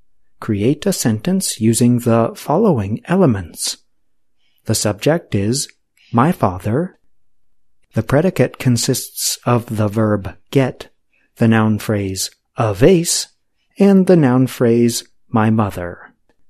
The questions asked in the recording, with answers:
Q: Create a sentence using the following elements.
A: My father got my mother a vase.